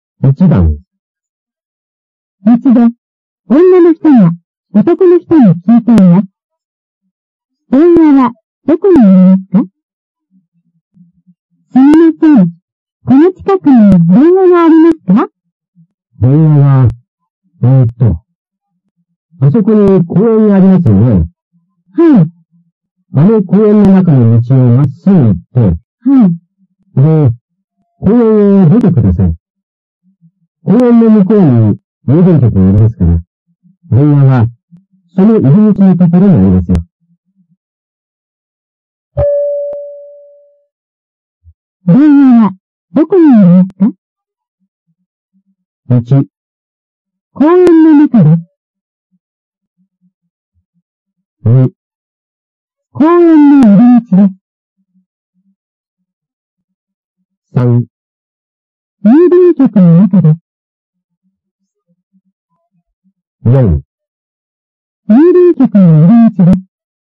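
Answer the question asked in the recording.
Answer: 4: 郵便局の入り口です。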